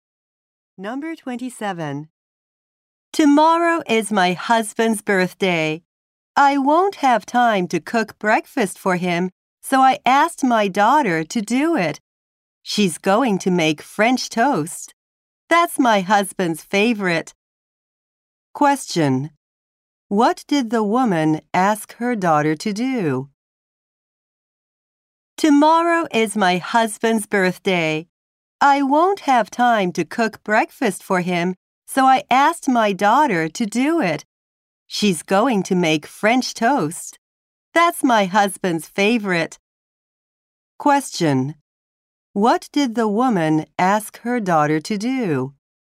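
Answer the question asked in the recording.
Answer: Make breakfast for her father.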